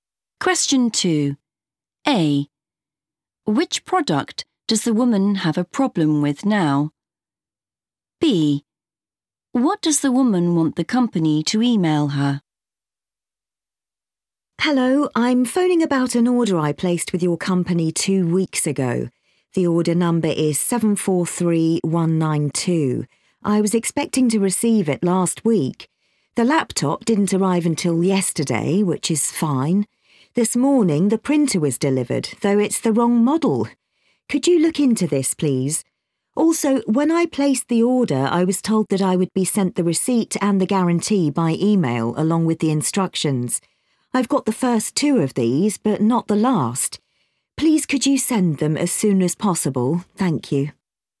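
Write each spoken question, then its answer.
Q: Which product does the woman have a problem with now?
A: the printer

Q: What does the woman want the company to email her?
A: the instructions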